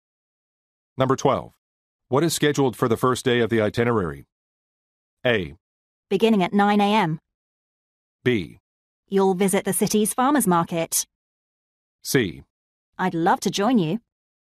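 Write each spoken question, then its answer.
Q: What is scheduled for the first day of the itinerary?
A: B: You'll visit the city's farmers market.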